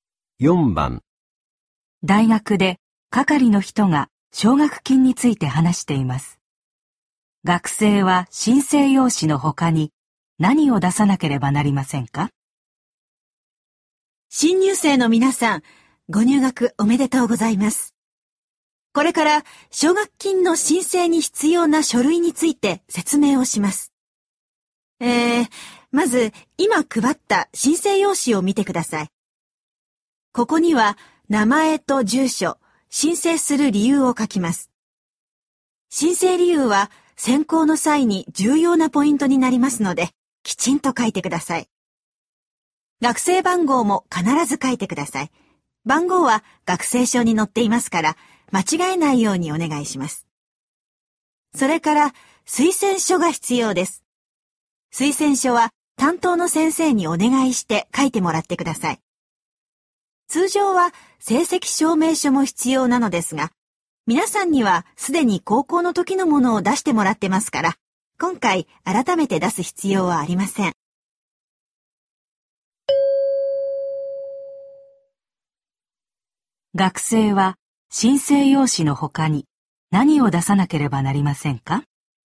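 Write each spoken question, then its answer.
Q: 学生は申請用紙の他に何を出さなければなりませんか?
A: 推薦書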